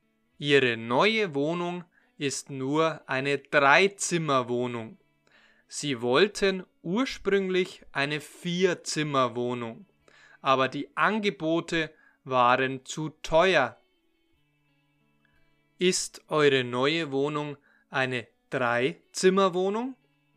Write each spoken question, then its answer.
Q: Ist eure neue Wohnung eine Dreizimmerwohnung?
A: Ja, das stimmt.